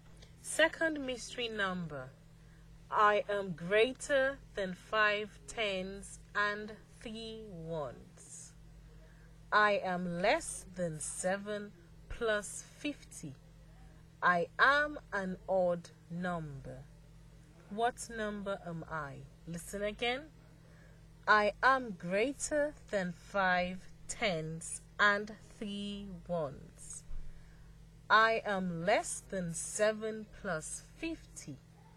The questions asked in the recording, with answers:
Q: What number am I?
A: I am the number 55.